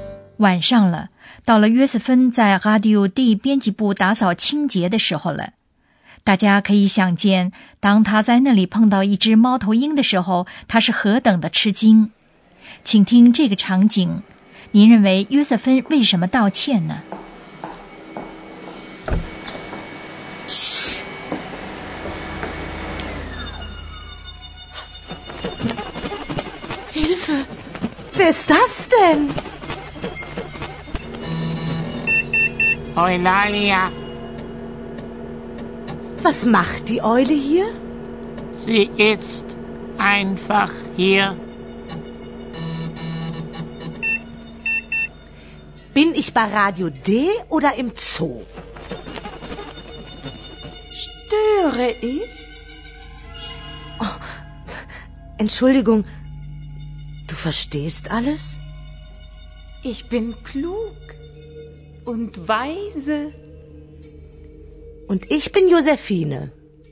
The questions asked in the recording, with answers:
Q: 您认为约瑟芬为什么道歉呢?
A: 当约瑟芬感觉到沃伊拉利亚不仅能说话,而且显得什么都懂的时候,他表示了歉意。